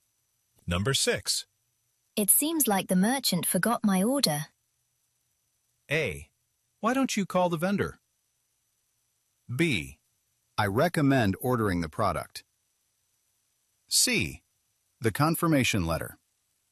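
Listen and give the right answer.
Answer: A: Why don't you call the vendor?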